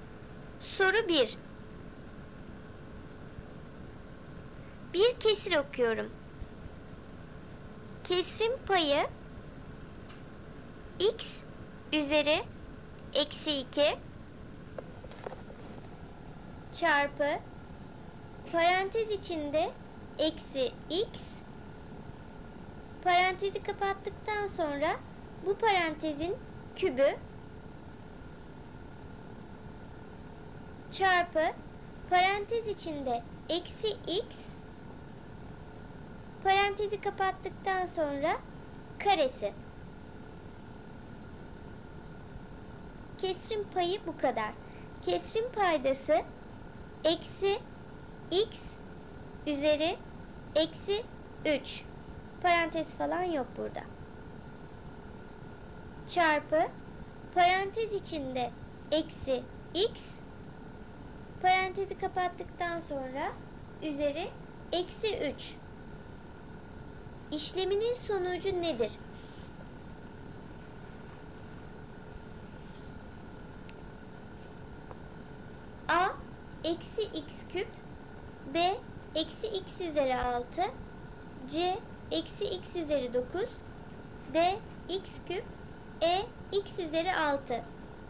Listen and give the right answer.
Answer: Doğru cevap C eksi x üzeri 9.